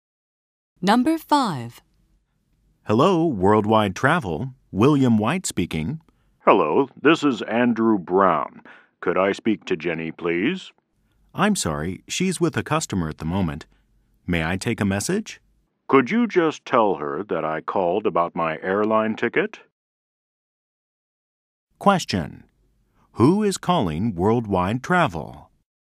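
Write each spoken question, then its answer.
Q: Who is calling Worldwide Travel?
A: Andrew Brown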